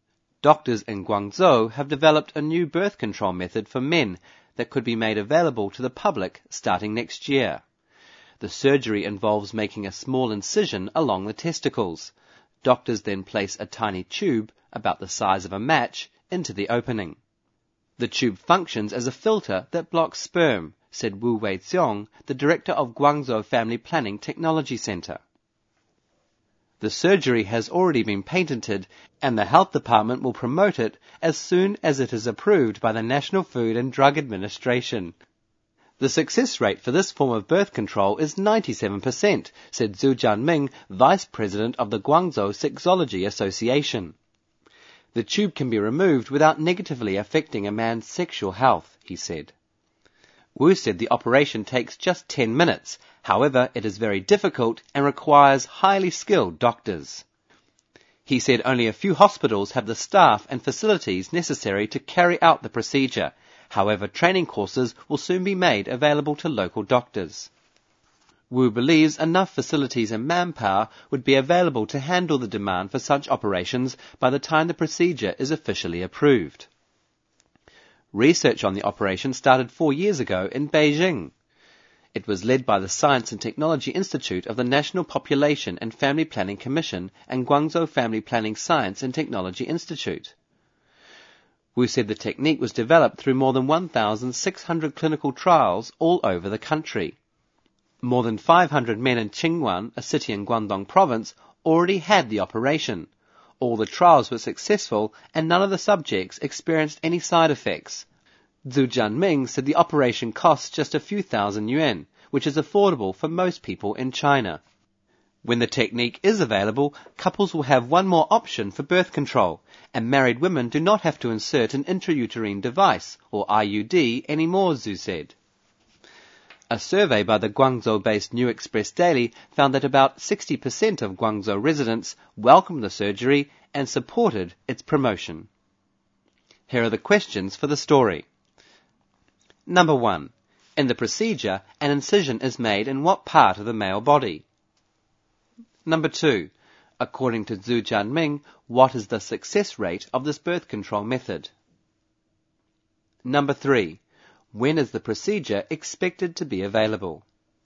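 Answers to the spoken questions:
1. Along the testicles
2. 97%
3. Starting next year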